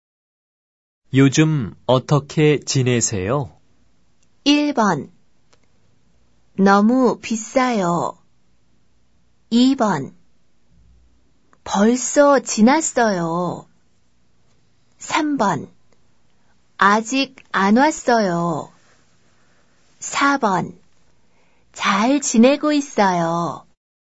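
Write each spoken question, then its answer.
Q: 요즘 어떻게 지내세요?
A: 4: 잘 지내고 있어요.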